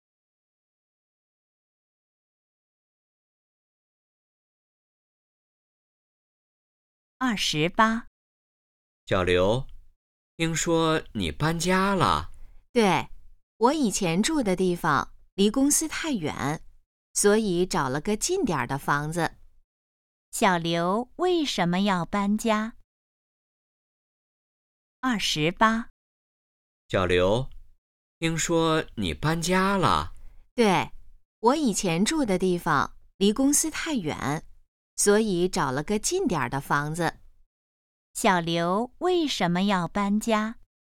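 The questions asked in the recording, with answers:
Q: 小刘为什么要搬家?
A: 以前住的地方离公司太远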